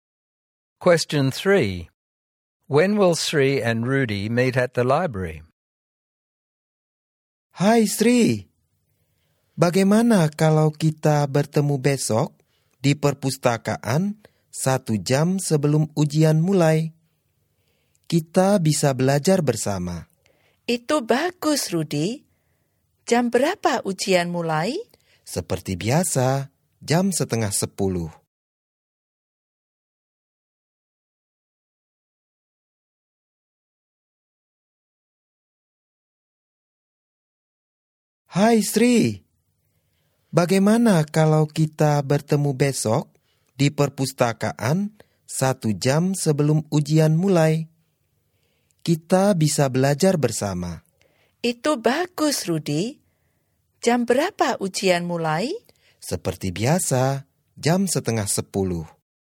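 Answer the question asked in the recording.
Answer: At 8:30 tomorrow, one hour before the exam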